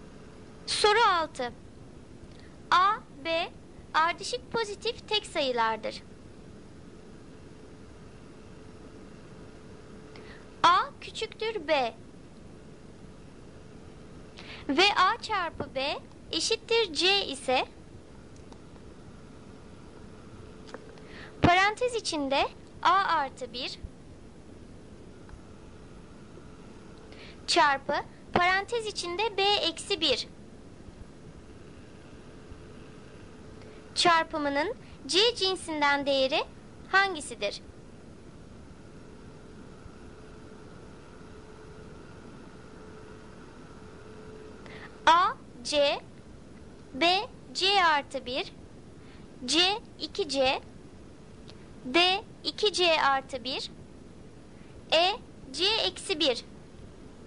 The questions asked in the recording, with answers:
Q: çarpımının c cinsinden değeri hangisidir?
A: Doğru cevap b c artı 1.